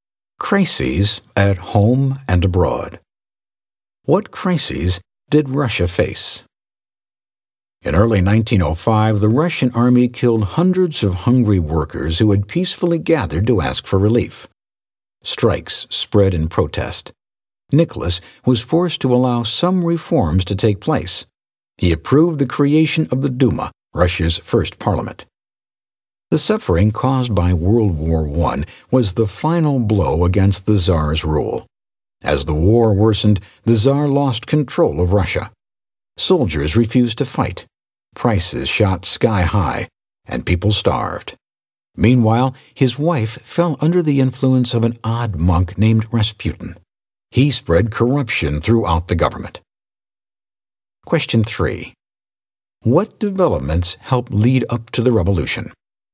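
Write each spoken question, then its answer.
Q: What developments helped lead up to the revolution?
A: The 1905 killing of workers and strikes, the suffering of World War I, and Rasputin's corruption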